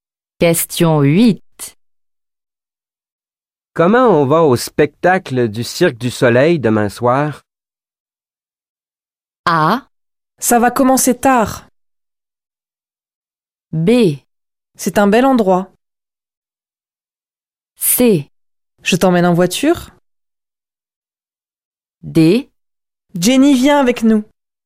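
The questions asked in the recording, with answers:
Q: Comment on va au spectacle du Cirque du Soleil demain soir?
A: C: Je t'emmène en voiture.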